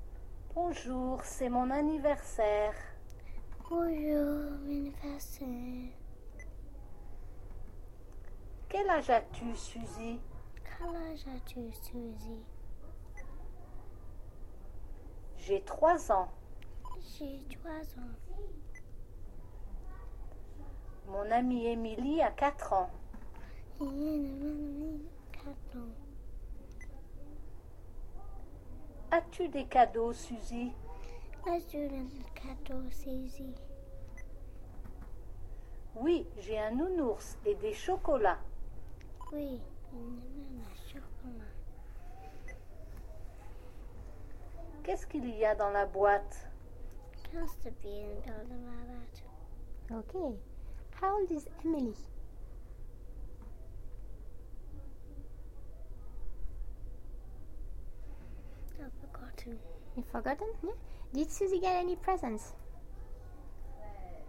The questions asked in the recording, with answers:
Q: Did Susie get any presents?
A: Yes?